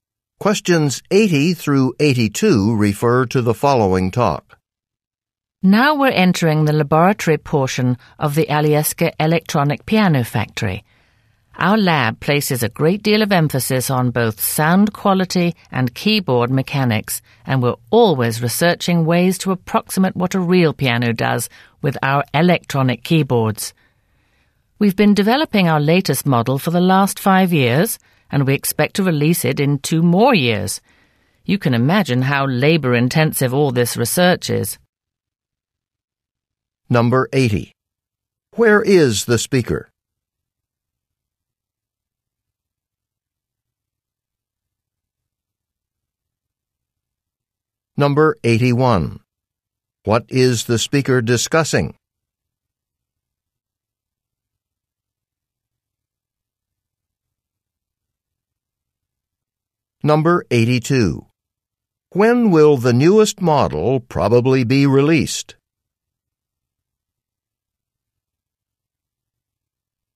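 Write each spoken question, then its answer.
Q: Where is the speaker?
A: In an electronic piano factory

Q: When will the newest model probably be released?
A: In 2 years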